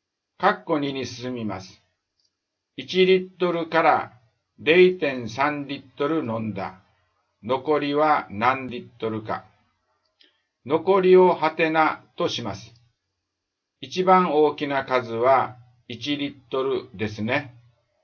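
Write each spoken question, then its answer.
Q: 1リットルから 0.3 リットル飲んだ。 残りは何リットルか。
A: 0.7リットル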